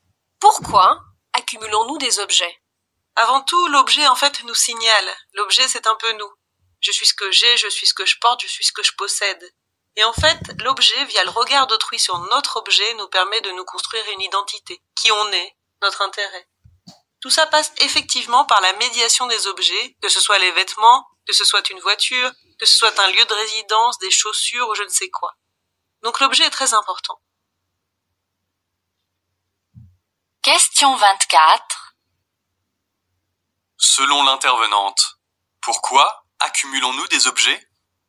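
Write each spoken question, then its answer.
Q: Selon l'intervenante, pourquoi accumulons-nous des objets ?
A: Pour nous construire une identité à travers le regard des autres sur nos objets.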